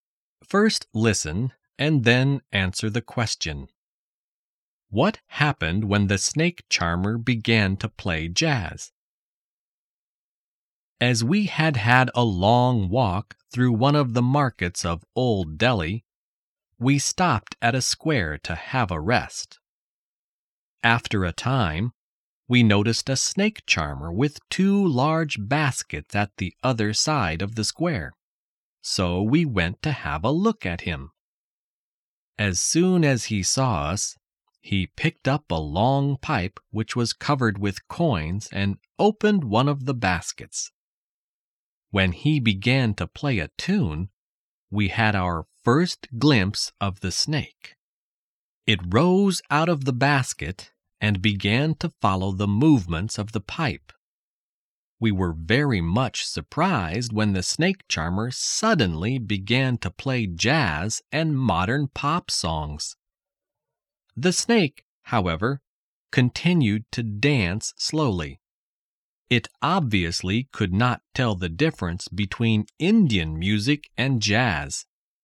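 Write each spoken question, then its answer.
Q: What happened when the snake charmer began to play jazz?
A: The snake continued to dance slowly; it could not tell the difference between Indian music and jazz.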